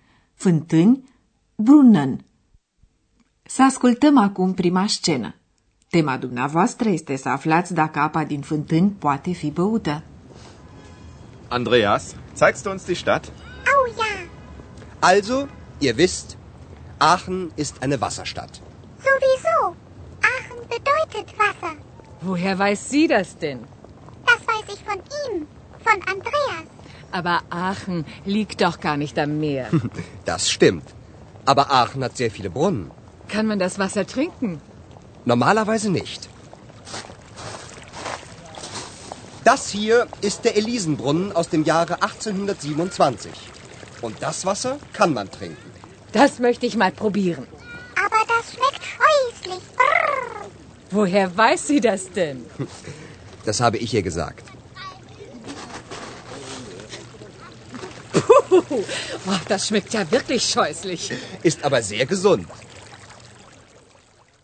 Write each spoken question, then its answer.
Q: Tema dumneavoastră este să aflați dacă apa din fântâni poate fi băută.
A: Așadar, în mod normal, apa din fântâni nu este potabilă. Însă apa dintr-o anumită fântână, numită Fântâna Elizei, se poate bea.